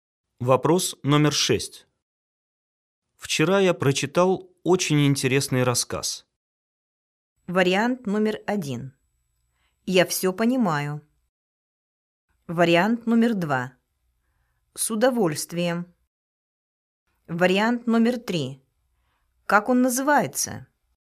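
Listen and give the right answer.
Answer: 3: Как он называется?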